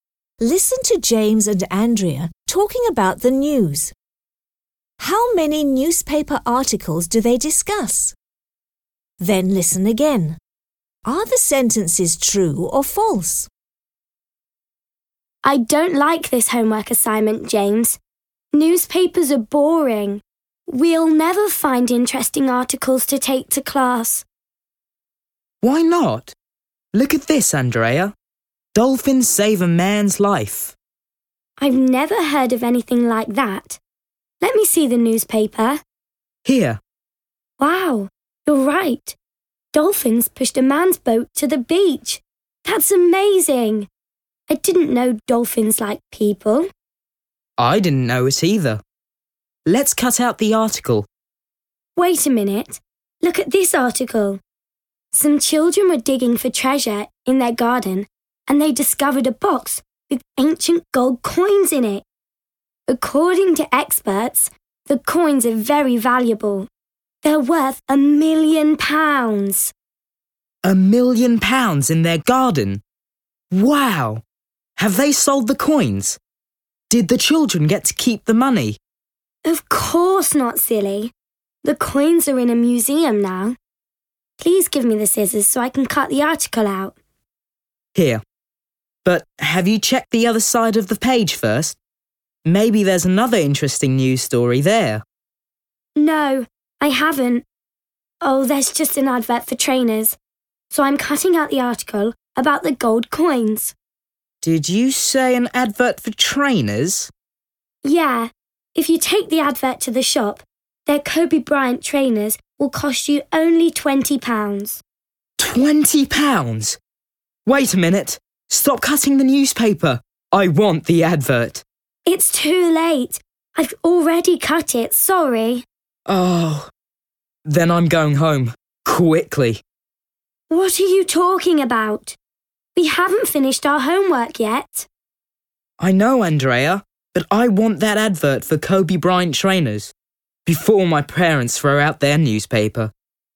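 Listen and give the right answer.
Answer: Two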